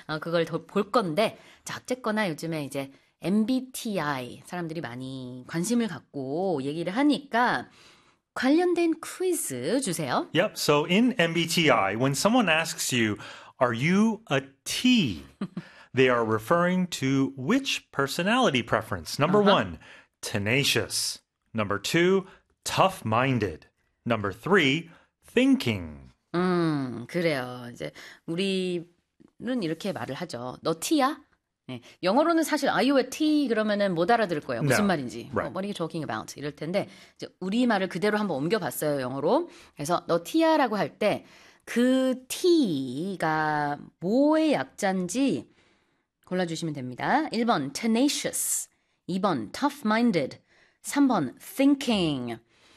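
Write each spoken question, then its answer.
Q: Yep, so in MBTI, when someone asks you, "Are you a T?" they are referring to which personality preference?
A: 3: thinking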